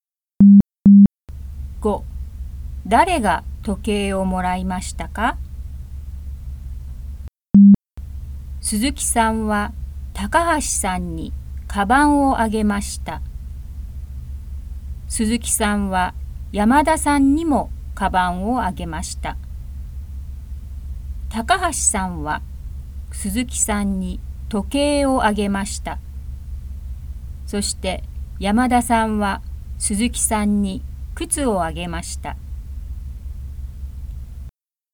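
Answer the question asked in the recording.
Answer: 鈴木さん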